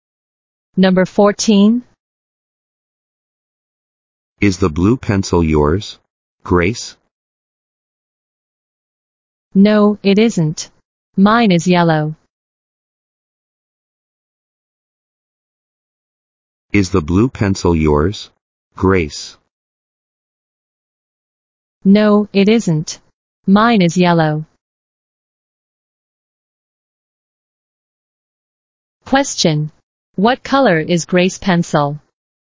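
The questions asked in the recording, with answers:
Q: Question.What color is Grace's pencil?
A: Yellow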